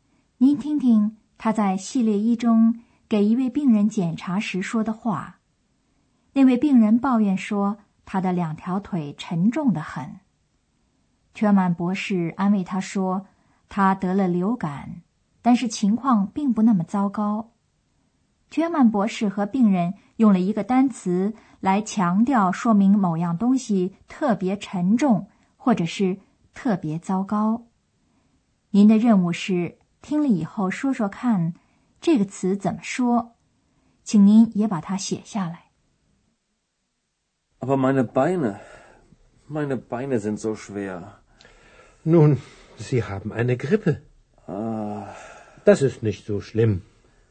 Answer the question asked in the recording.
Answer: 最后要找的是 so 这样